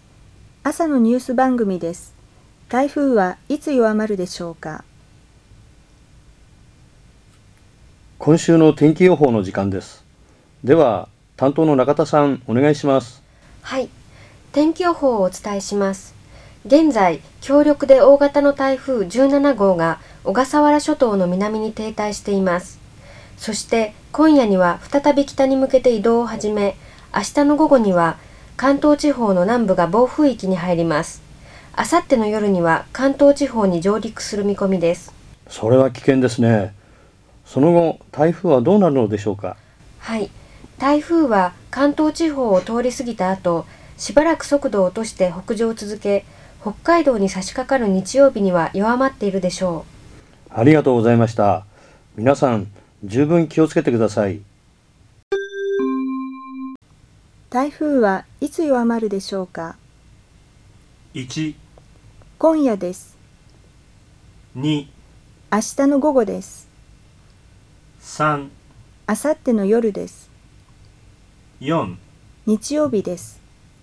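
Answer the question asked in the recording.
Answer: 4: 日曜日です。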